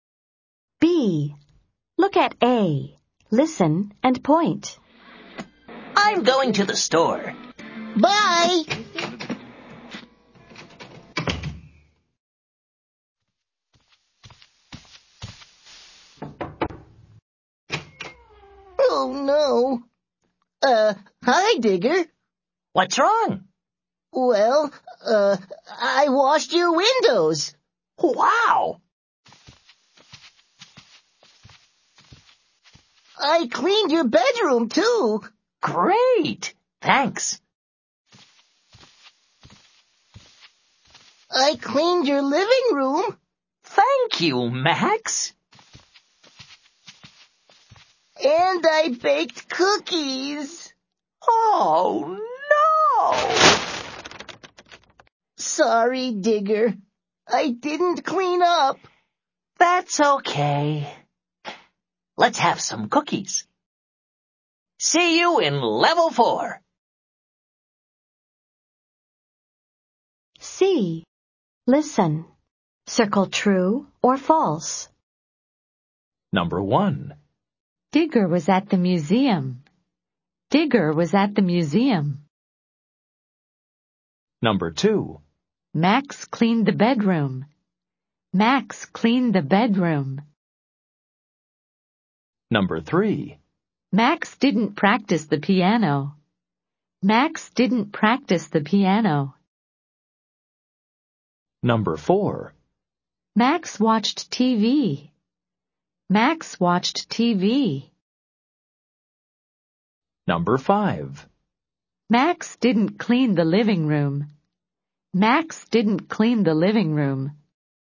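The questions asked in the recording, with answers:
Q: Max cleaned the bedroom.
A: True

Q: Max didn't clean the living room.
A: False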